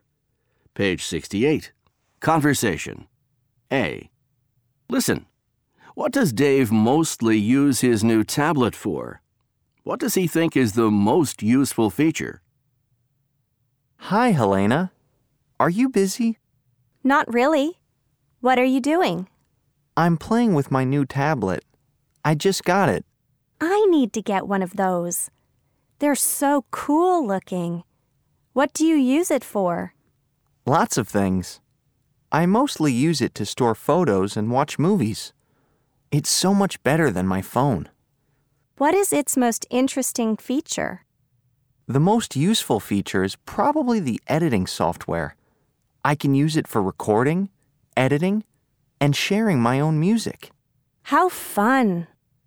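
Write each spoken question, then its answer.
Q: What does Dave mostly use his new tablet for?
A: To store photos and watch movies

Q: What does he think is the most useful feature?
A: The editing software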